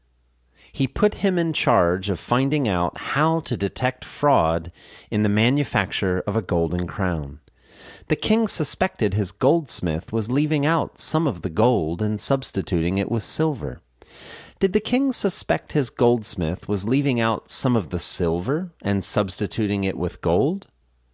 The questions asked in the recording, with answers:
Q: Did the king suspect his goldsmith was leaving out some of the silver and substituting it with gold?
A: No. He suspected his goldsmith was leaving out some of the gold and substituting it with silver.